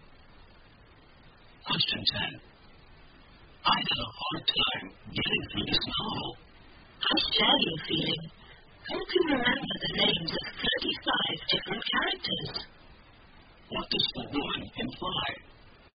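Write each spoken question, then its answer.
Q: What does the woman imply?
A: She also found the novel hard to get through because it had too many characters.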